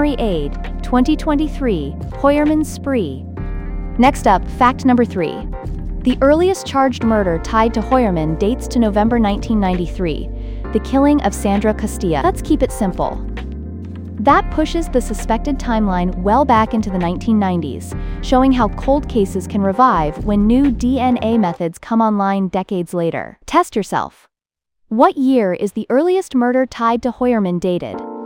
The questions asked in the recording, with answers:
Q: What year is the earliest murder tied to Hoyerman dated?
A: Correct answer, 1993.